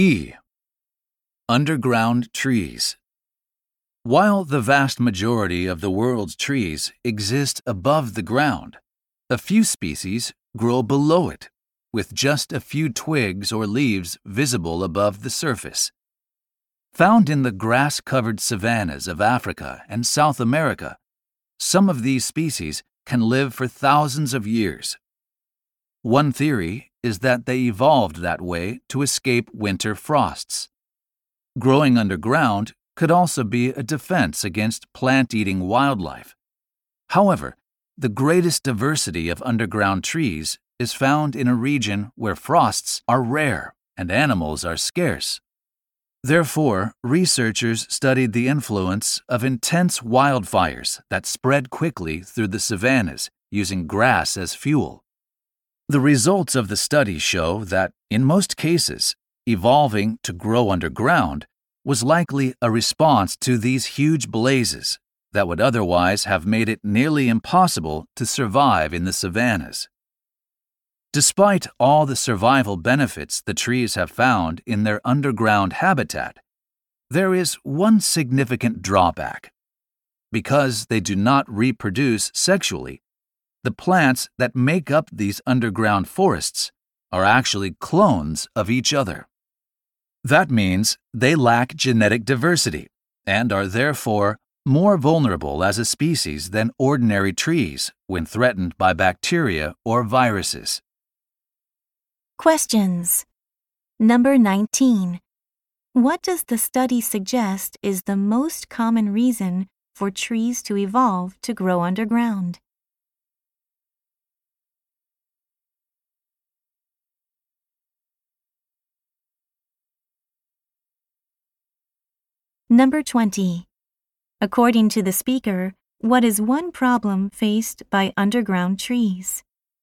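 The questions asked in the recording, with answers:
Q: What does the study suggest is the most common reason for trees to evolve to grow underground?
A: To survive the intense wildfires that spread through the savannas

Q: According to the speaker, what is one problem faced by underground trees?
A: They are clones with no genetic diversity, so they are more vulnerable to bacteria or viruses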